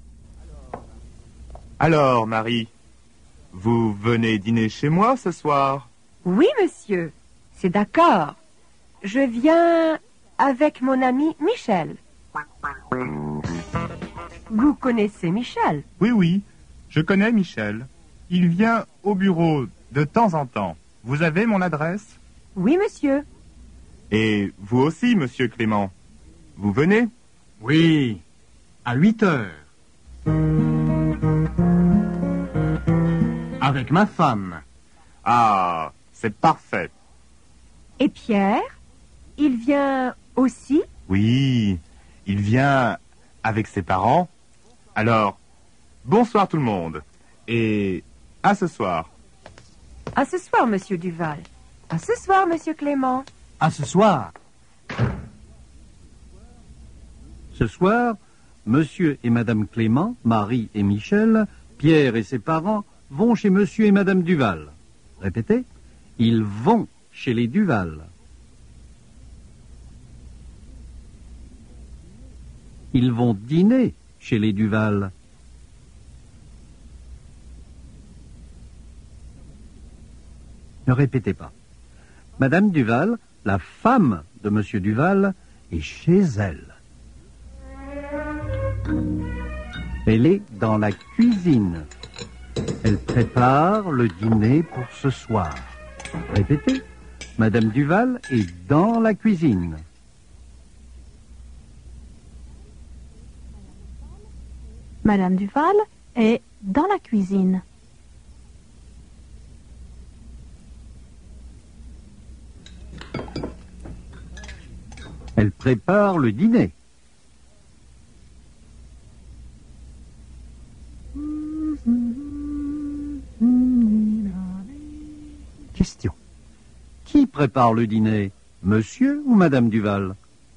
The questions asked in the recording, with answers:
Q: Qui prépare le dîner, monsieur ou madame Duval?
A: C'est madame Duval qui prépare le dîner.